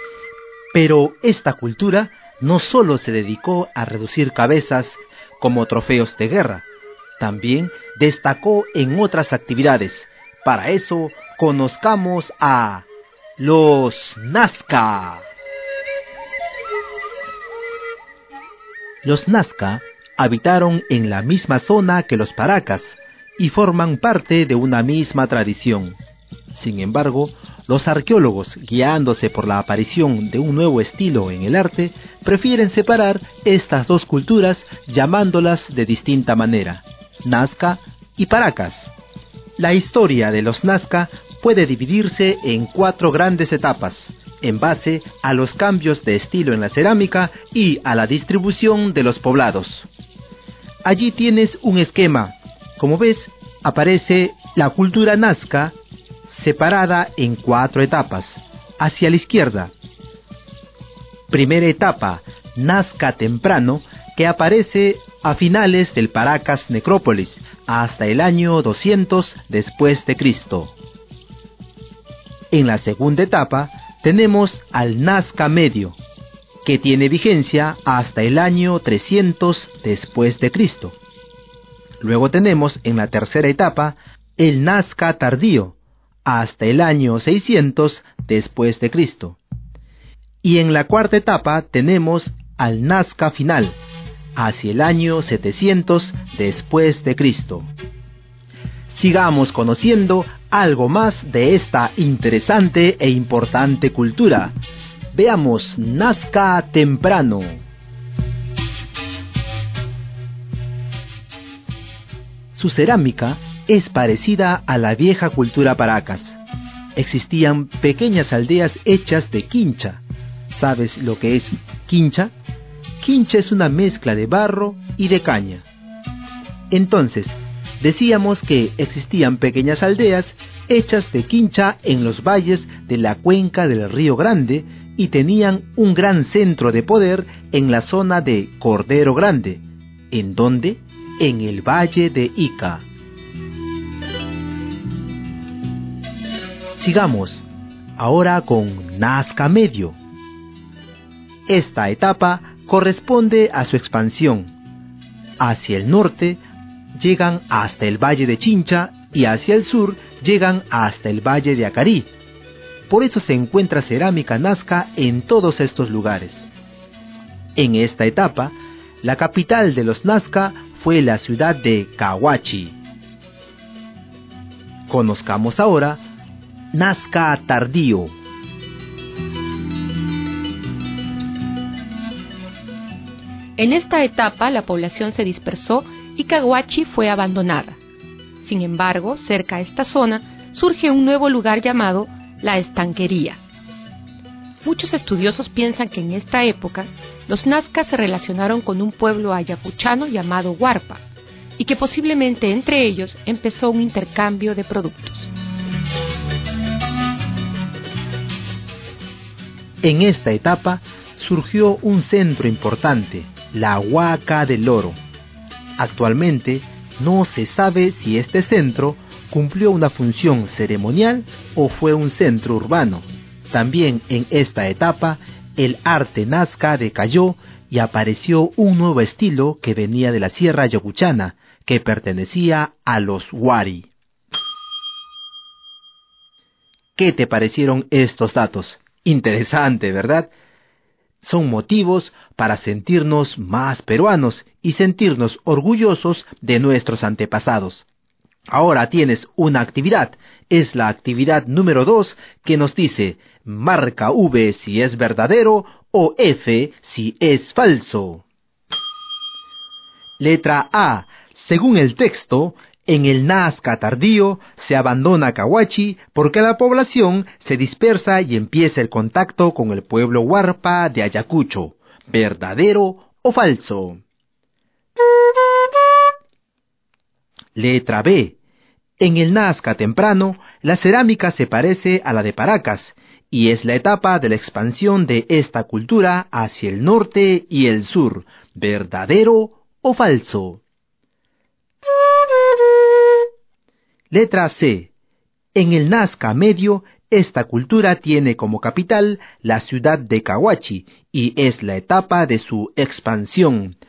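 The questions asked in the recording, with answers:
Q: En el Nazca temprano, la cerámica se parece a la de Paracas y es la etapa de la expansión de esta cultura hacia el norte y el sur. ¿Verdadero o falso?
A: Falso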